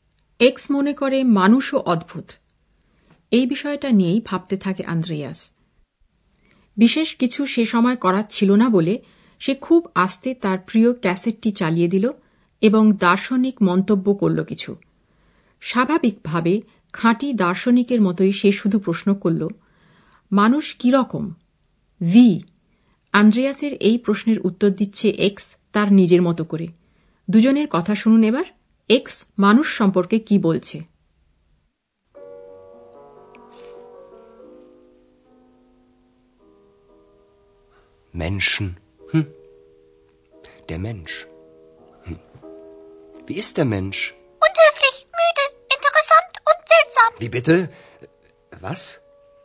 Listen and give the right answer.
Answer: x জানে মানুষ কি রকম যেমন সে মনে করে মানুষ হচ্ছে কৌতূহলী নয় গিয়ারেক